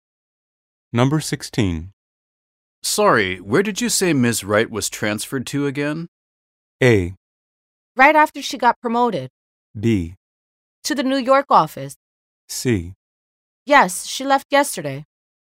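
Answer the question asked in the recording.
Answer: B: To the New York office.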